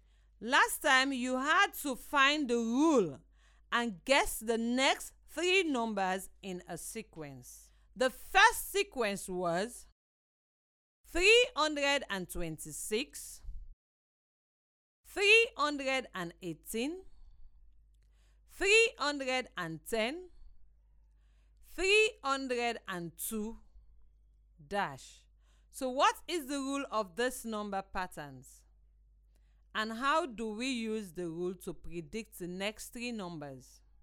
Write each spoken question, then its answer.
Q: So what is the rule of this number patterns?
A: The rule must be subtract 8.

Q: And how do we use the rule to predict the next three numbers?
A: I think the next three numbers are 294, 286, 278.